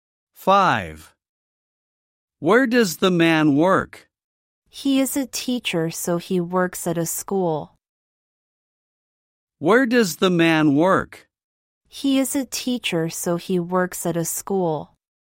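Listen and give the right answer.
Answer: At a school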